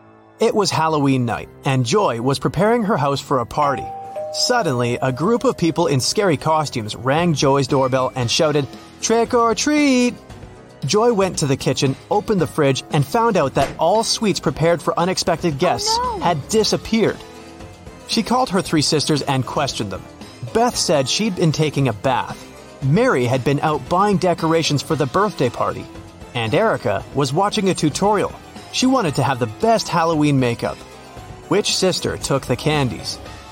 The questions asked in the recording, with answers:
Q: Which sister took the candies?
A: Mary.